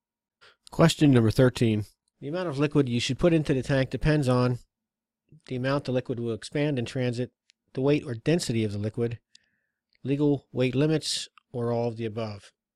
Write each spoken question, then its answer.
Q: The amount of liquid you should put into the tank depends on the amount the liquid will expand in transit, the weight or density of the liquid, legal weight limits, or all of the above.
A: D, it's all the above.